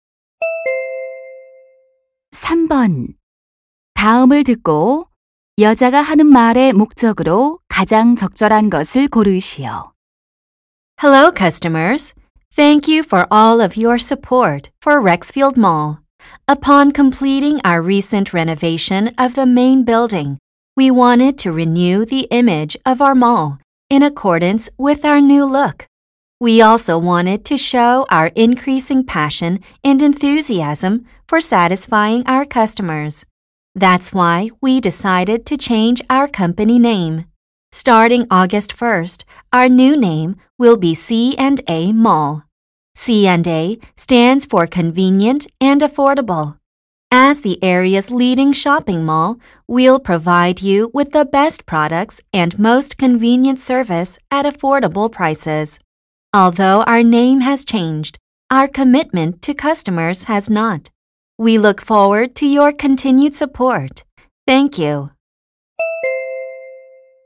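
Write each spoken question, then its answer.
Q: 다음을 듣고 여자가 하는 말의 목적으로 가장 적절한 것을 고르시오.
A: 쇼핑몰 회사명 변경을 알리려고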